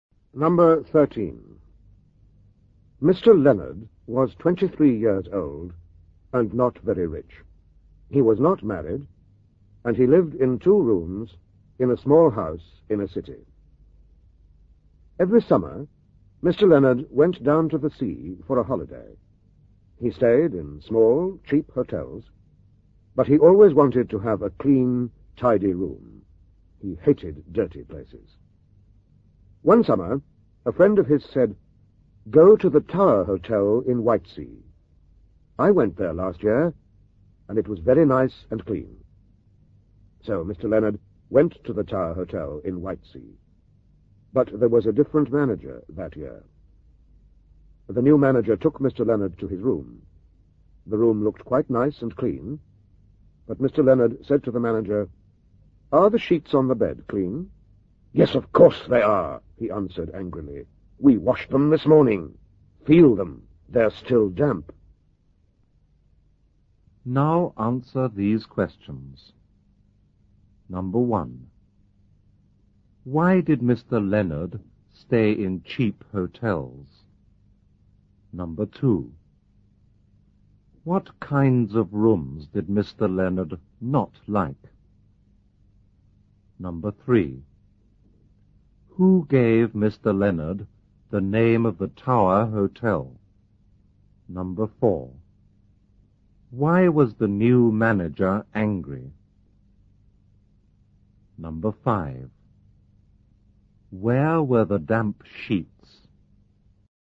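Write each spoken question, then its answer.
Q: Why did Mr. Leonard stay in cheap hotels?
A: Because he was not very rich

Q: What kinds of rooms did Mr. Leonard not like?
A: Dirty rooms

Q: Who gave Mr. Leonard the name of the Tower Hotel?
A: A friend of his

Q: Why was the new manager angry?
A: Because Mr. Leonard asked if the sheets were clean

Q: Where were the damp sheets?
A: On the bed in Mr. Leonard's room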